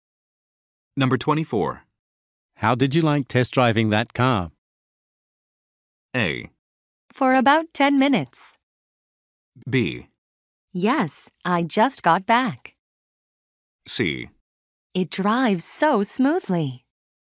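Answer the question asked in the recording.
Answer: C: It drives so smoothly.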